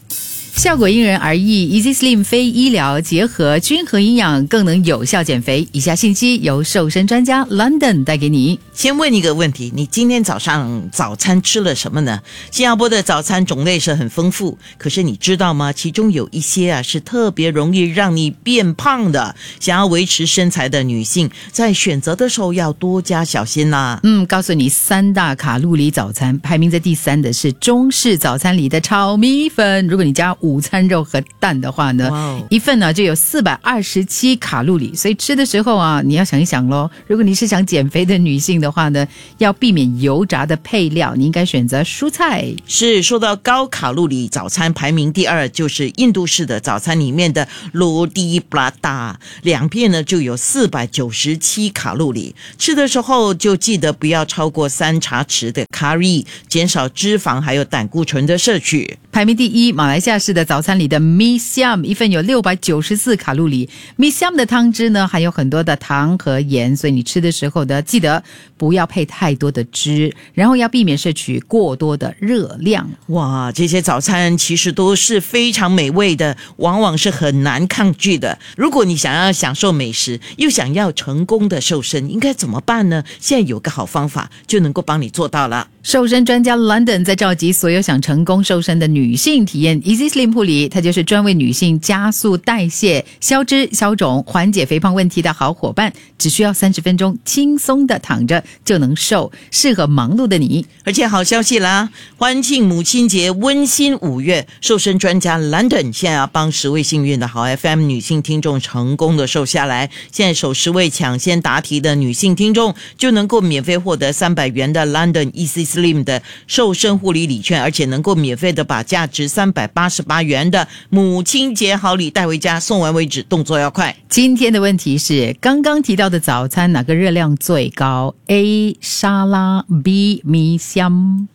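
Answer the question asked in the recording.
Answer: B: 米香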